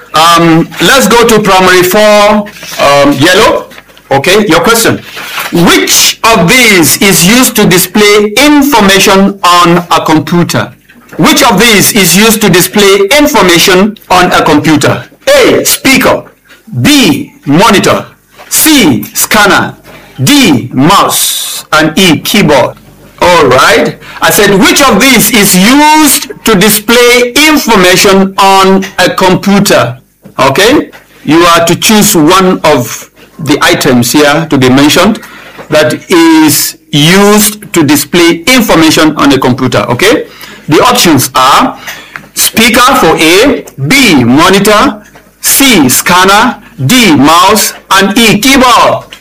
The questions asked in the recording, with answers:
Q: Which of these is used to display information on a computer?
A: B, monitor.